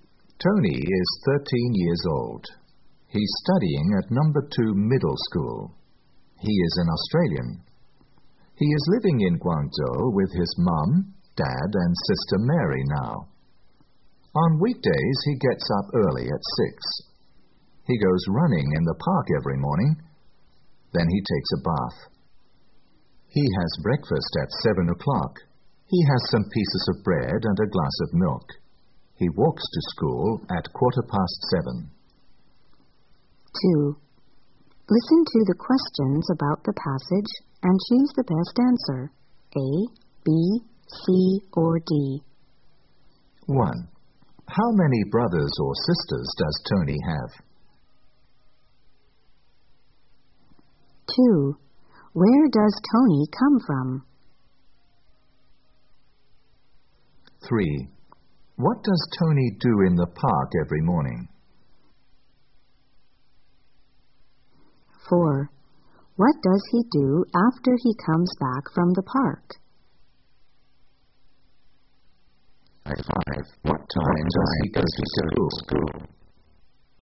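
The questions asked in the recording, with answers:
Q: How many brothers or sisters does Tony have?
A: One (a sister, Mary)

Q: Where does Tony come from?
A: Australia

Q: What does Tony do in the park every morning?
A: He goes running

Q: What does he do after he comes back from the park?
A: He takes a bath

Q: What time does he go to school?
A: At 7:15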